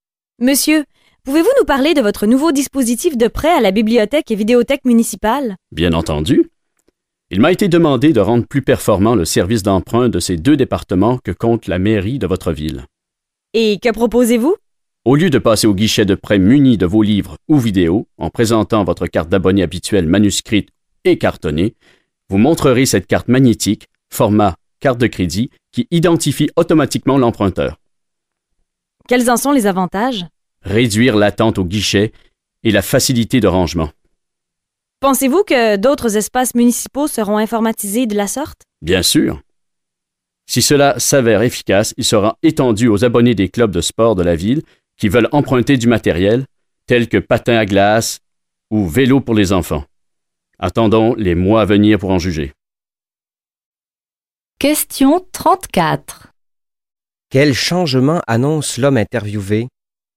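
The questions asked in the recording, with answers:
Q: Quel changement annonce l'homme interviewé?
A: Une carte magnétique (format carte de crédit) remplacera la carte d'abonné cartonnée pour emprunter à la bibliothèque et vidéothèque.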